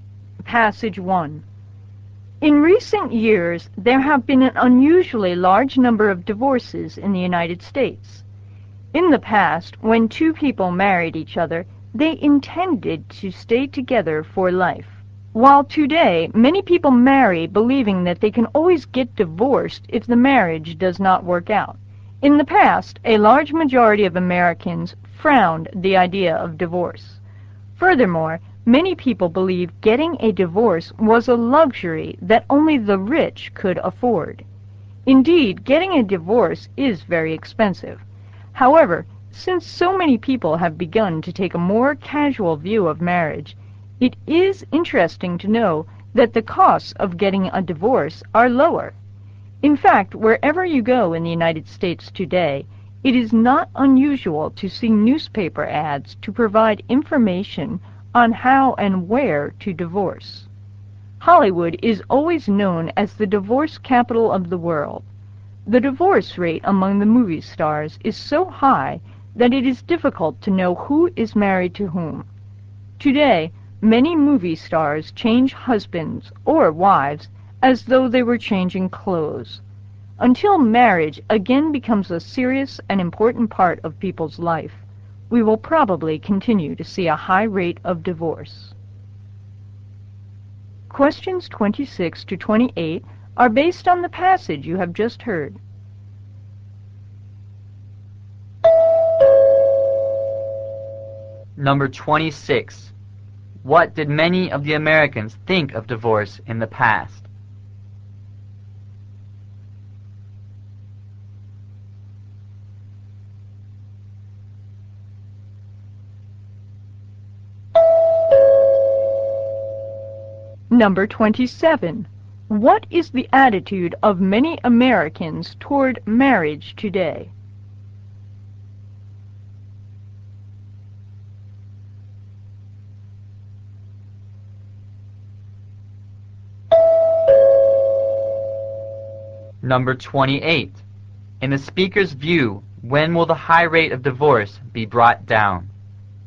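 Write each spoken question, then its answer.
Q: What did many of the Americans think of divorce in the past?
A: They frowned on it and thought it was a luxury only the rich could afford

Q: What is the attitude of many Americans toward marriage today?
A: They take a casual view of it

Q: In the speaker's view, when will the high rate of divorce be brought down?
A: When marriage again becomes a serious and important part of people's lives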